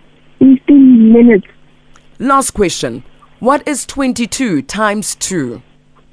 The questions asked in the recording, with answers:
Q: What is 22 times 2?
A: 44.